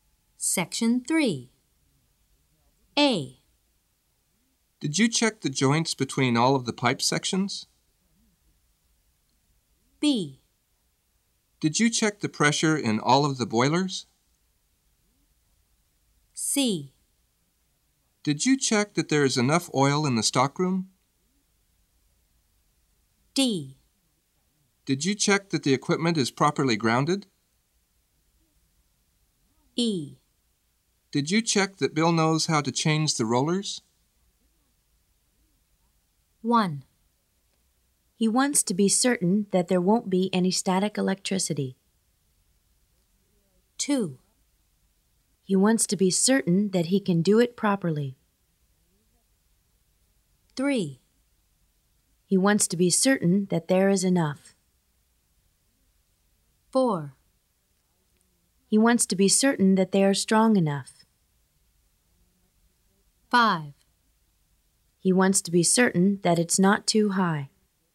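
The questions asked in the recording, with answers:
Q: He wants to be certain that there won't be any static electricity.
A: D: Did you check that the equipment is properly grounded?

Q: He wants to be certain that he can do it properly.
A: E: Did you check that Bill knows how to change the rollers?

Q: He wants to be certain that there is enough.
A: C: Did you check that there is enough oil in the stockroom?

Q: He wants to be certain that it's not too high.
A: B: Did you check the pressure in all of the boilers?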